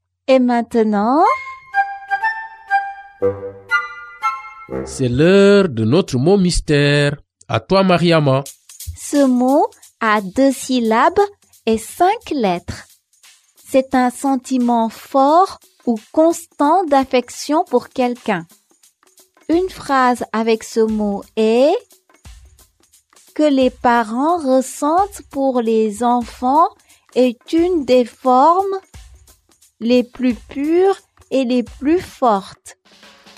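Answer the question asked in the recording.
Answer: amour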